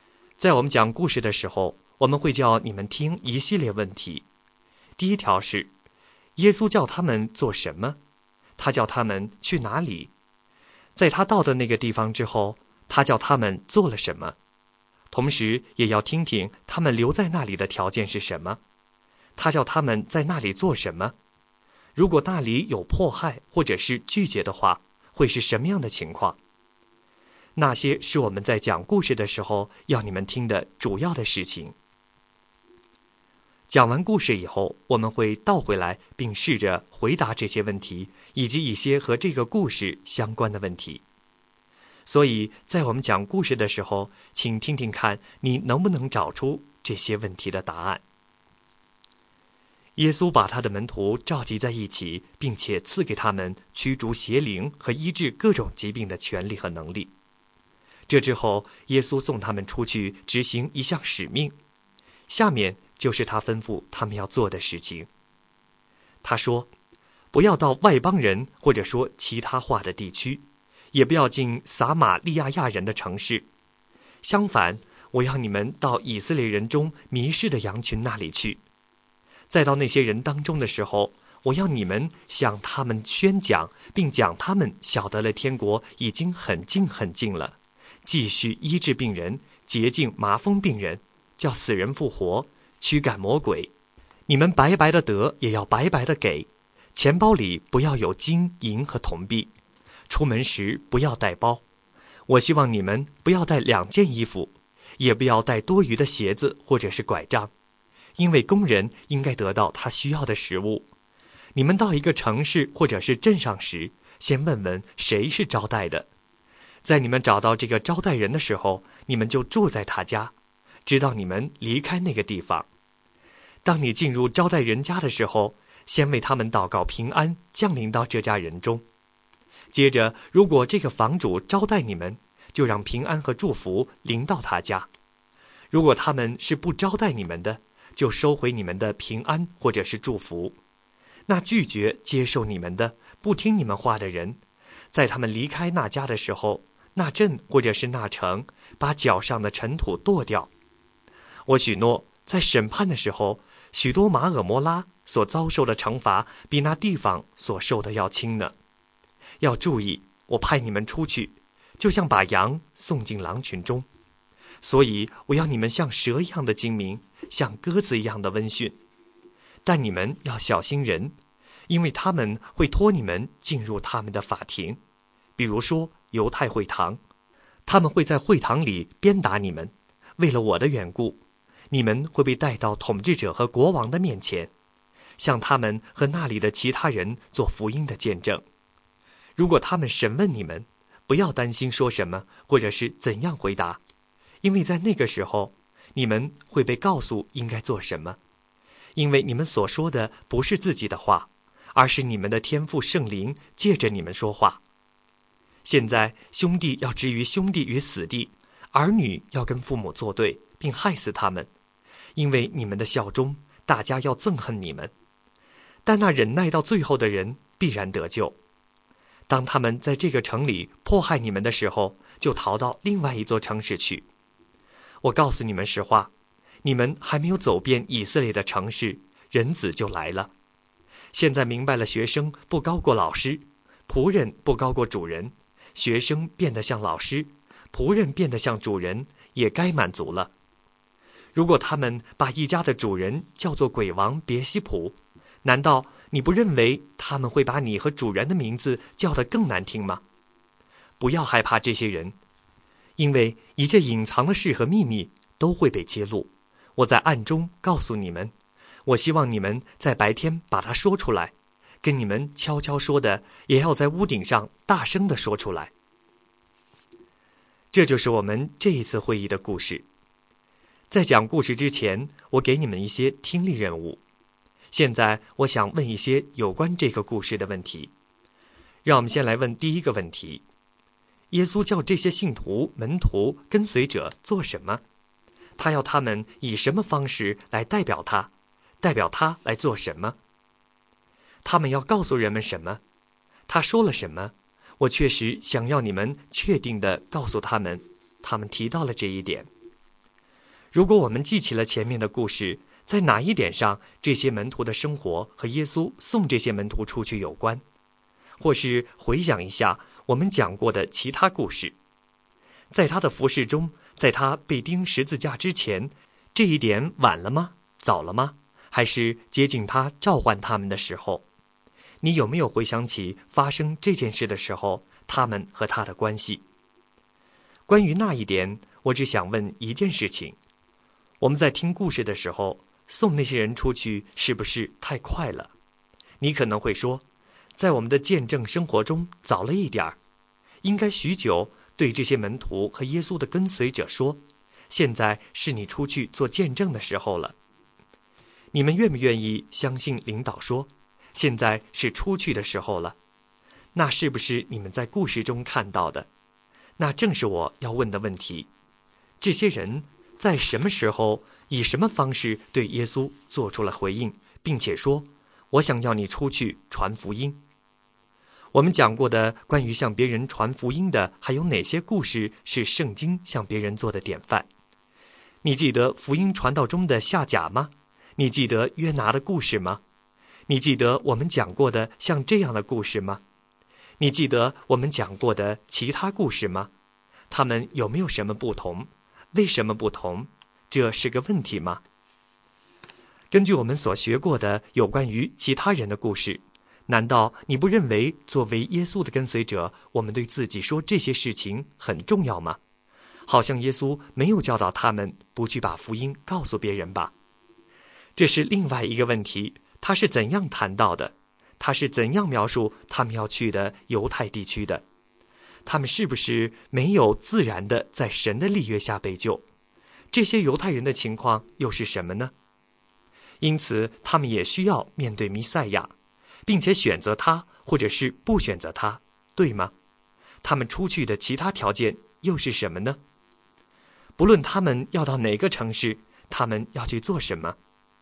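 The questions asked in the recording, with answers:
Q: 耶稣叫这些信徒、门徒、跟随者做什么?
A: 去以色列人中迷失的羊群那里,宣讲天国近了,医治病人,洁净麻风病人,叫死人复活,驱赶魔鬼

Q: 他是怎样描述他们要去的犹太地区的?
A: 以色列人中迷失的羊群

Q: 不论他们要到哪个城市,他们要去做什么?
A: 他告诉他们应该怎样去和谁去,这样他们就可以找到接待的人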